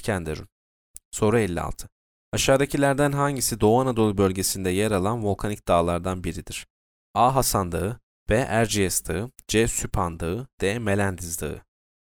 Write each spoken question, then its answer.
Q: Aşağıdakilerden hangisi Doğu Anadolu bölgesinde yer alan volkanik dağlardan biridir?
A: C. Süphan Dağı.